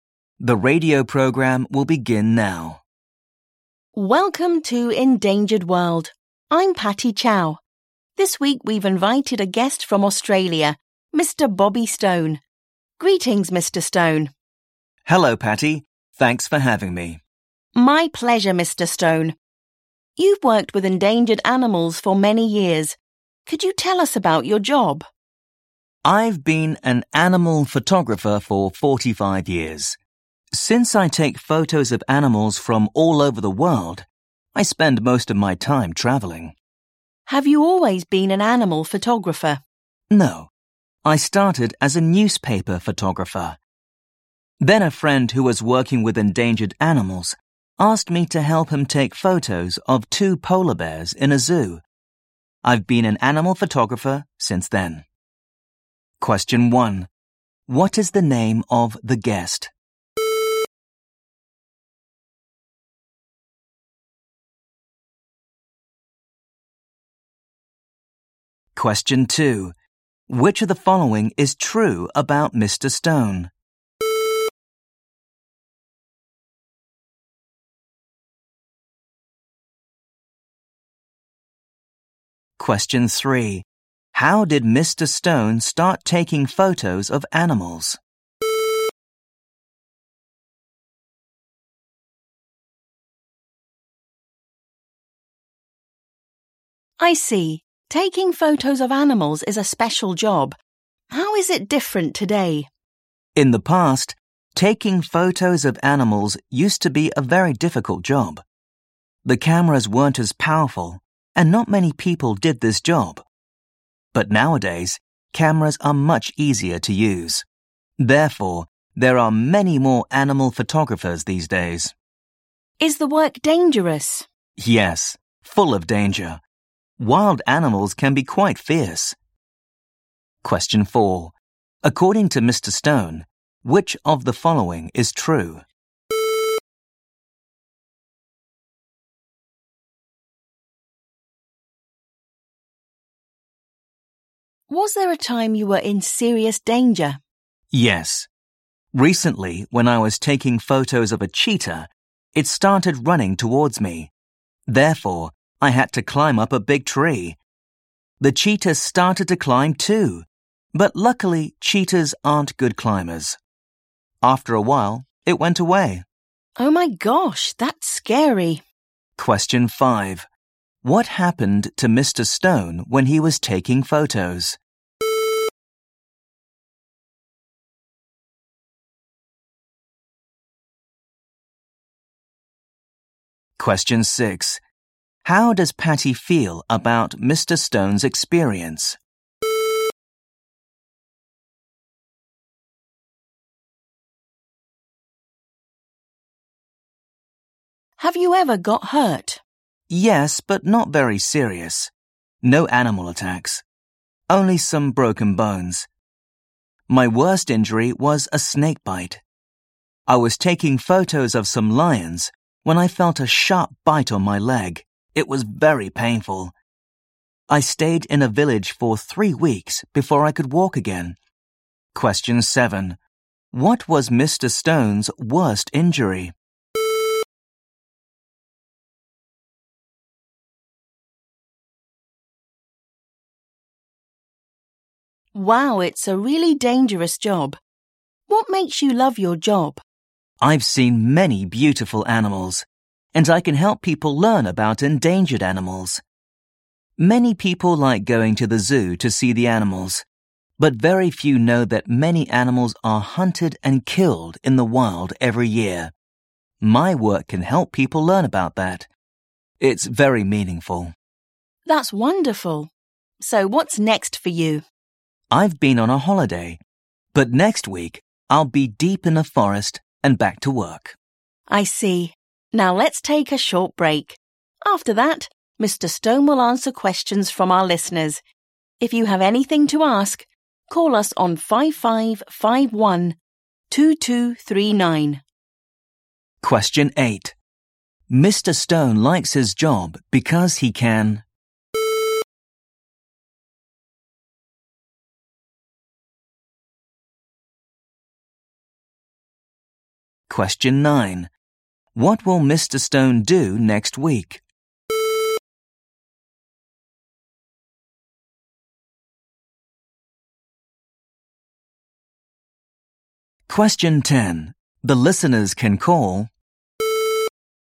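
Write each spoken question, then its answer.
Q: What is the name of the guest?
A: Bobby Stone

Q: How did Mr. Stone start taking photos of animals?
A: A friend asked him to help take photos of two polar bears in a zoo

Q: What happened to Mr. Stone when he was taking photos?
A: A cheetah ran towards him and he had to climb up a big tree

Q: How does Patty feel about Mr. Stone's experience?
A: She thinks it is scary

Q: What was Mr. Stone's worst injury?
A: A snake bite

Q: Mr. Stone likes his job because he can...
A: help people learn about endangered animals

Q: What will Mr. Stone do next week?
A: He will be deep in a forest, back at work

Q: The listeners can call...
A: 5551 2239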